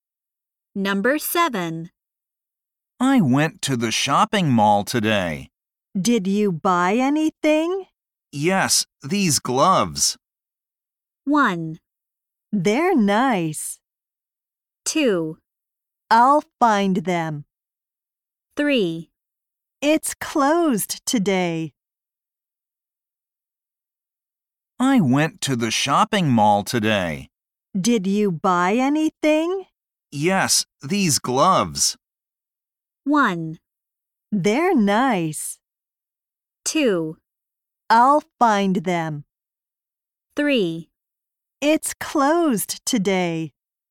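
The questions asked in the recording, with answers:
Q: Yes, these gloves.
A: 1: They're nice.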